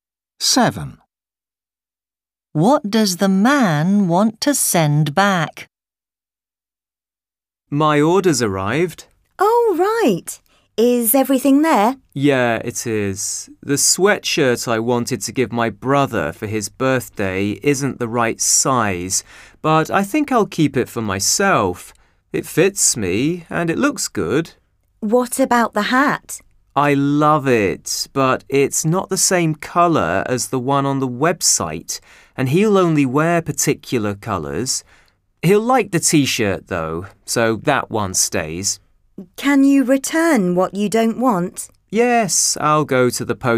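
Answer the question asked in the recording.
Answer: The hat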